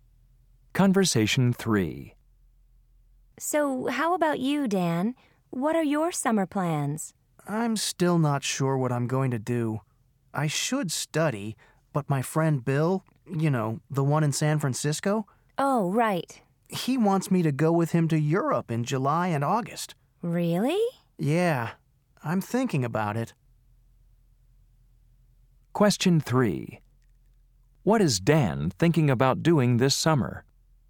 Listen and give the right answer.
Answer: You should go to Europe this summer.